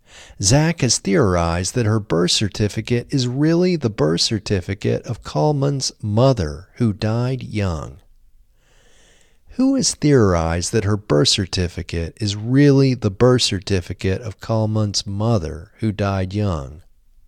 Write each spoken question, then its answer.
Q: Who has theorized that her birth certificate is really the birth certificate of Kalman's mother, who died young?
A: Zak has theorized that her birth certificate is really the birth certificate of Kalman's mother, who died young.